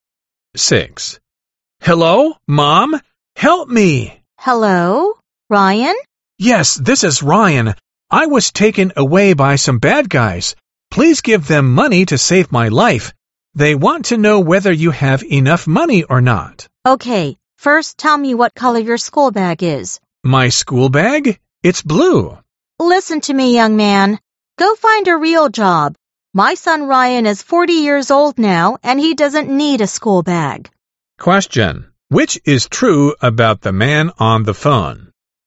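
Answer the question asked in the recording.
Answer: He is a scammer pretending to be her son Ryan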